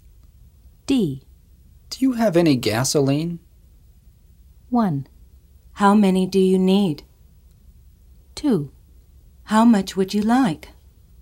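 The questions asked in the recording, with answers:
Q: Do you have any gasoline?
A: 2: How much would you like?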